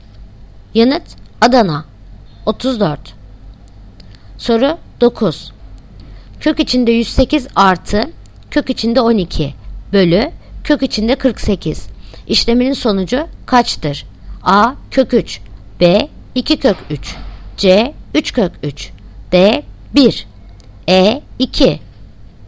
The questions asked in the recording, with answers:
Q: İşleminin sonucu kaçtır?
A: Yanıt Edirne 2.